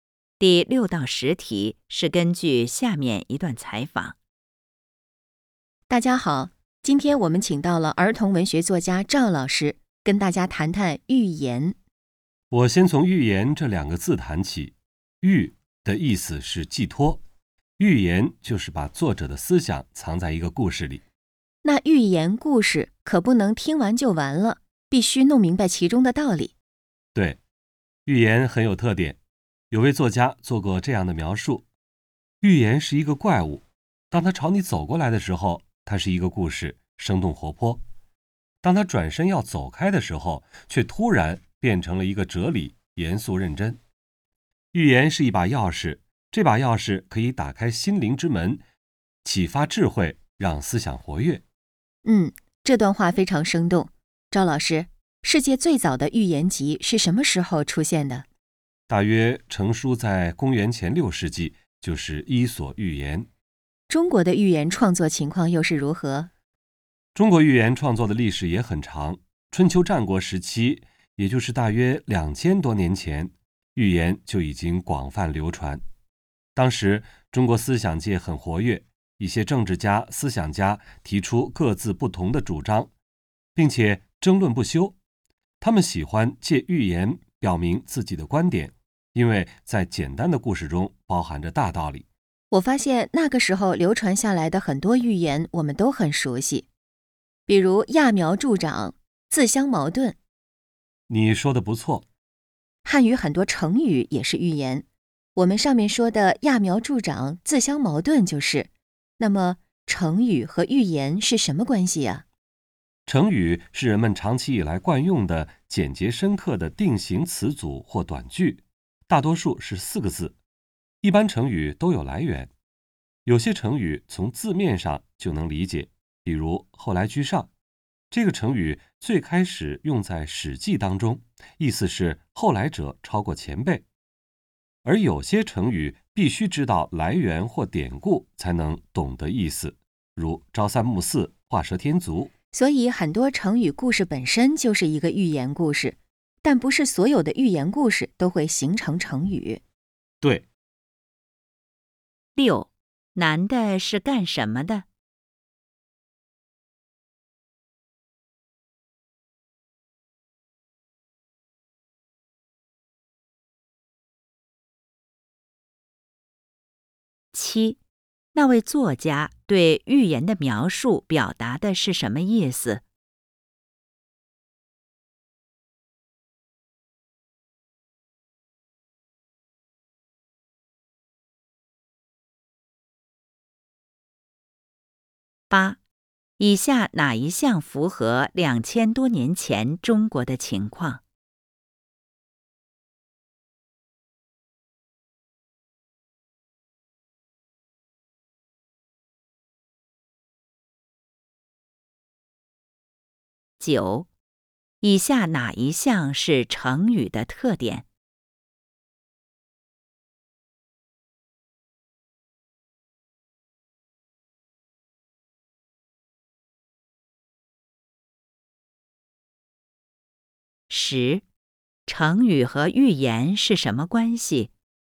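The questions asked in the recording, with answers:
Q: 成语和寓言是什么关系?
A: 很多成语故事本身就是寓言,但不是所有寓言都会形成成语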